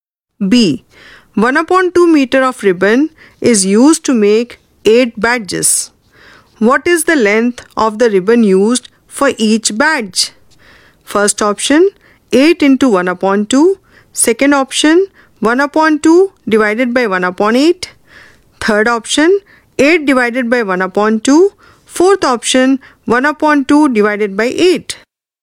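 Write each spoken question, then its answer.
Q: What is the length of the ribbon used for each badge?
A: Fourth option: 1 upon 2 divided by 8 (1/16 m)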